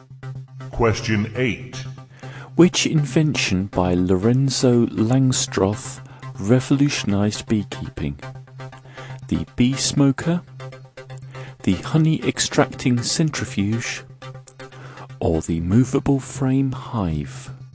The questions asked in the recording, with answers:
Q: Which invention by Lorenzo Langstroth revolutionized beekeeping?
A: Lorenzo Langstroth invented the movable frame hive